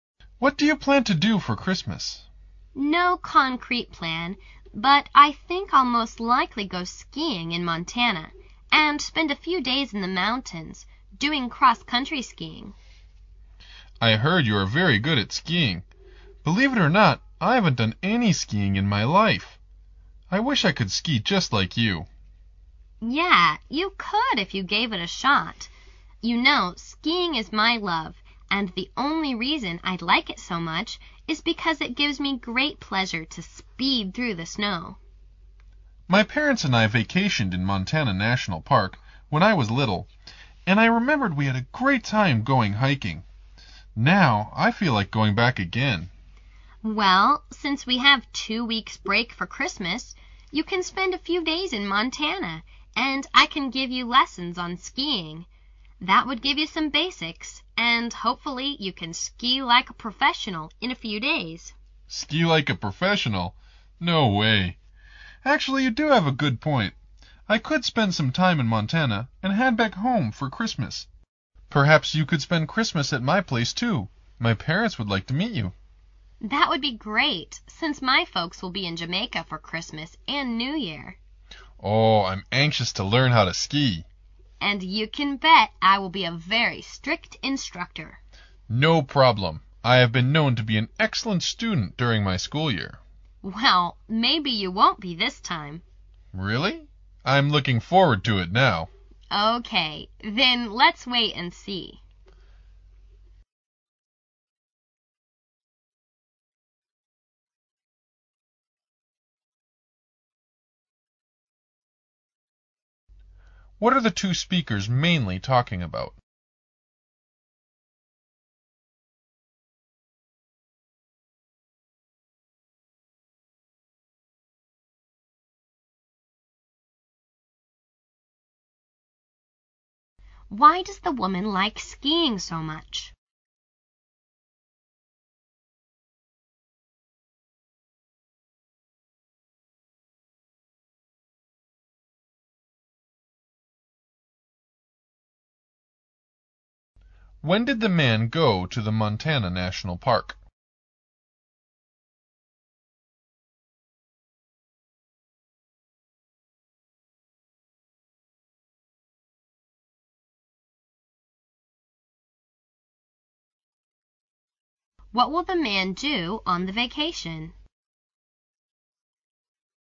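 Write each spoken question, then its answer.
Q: What are the two speakers mainly talking about?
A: Their plans for the Christmas vacation (skiing in Montana)

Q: Why does the woman like skiing so much?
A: It gives her great pleasure to speed through the snow

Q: When did the man go to the Montana National Park?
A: When he was little, with his parents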